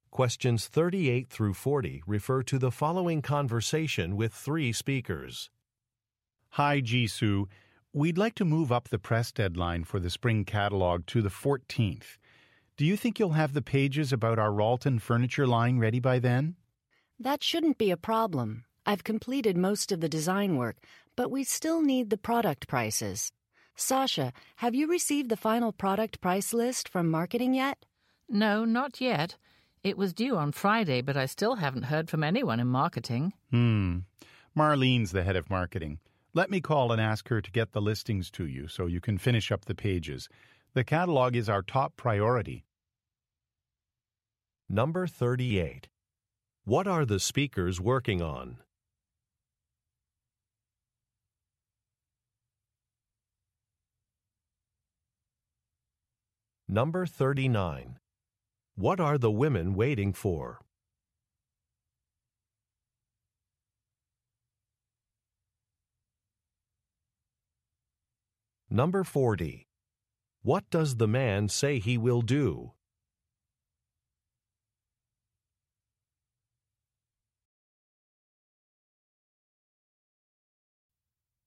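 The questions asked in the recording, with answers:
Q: What are the speakers working on?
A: A spring catalog

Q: What are the women waiting for?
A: The final product price list from marketing

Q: What does the man say he will do?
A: Call the head of marketing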